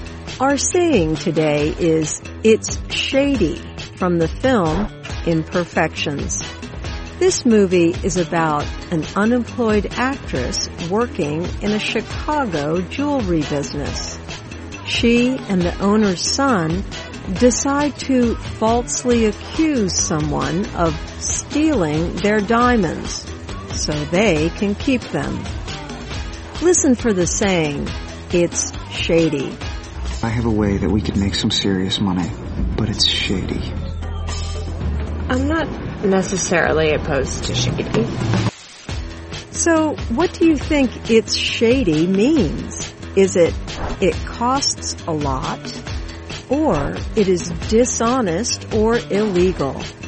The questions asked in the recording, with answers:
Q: So what do you think it's shady means? Is it costs a lot, or it is dishonest or illegal?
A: It's shady means it is dishonest or illegal.